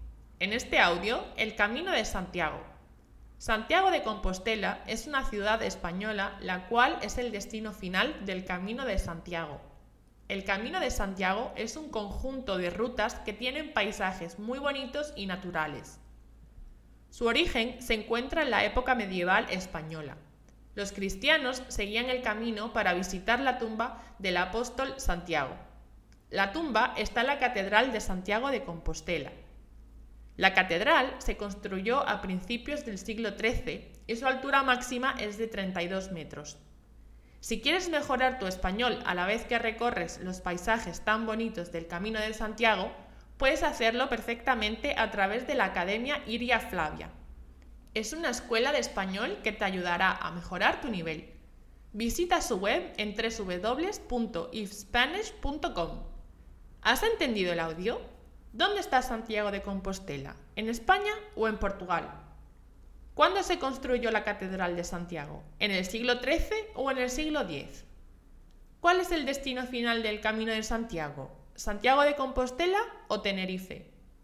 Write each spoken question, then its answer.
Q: ¿Dónde está Santiago de Compostela?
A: en España

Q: ¿Cuál es el destino final del Camino de Santiago?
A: Santiago de Compostela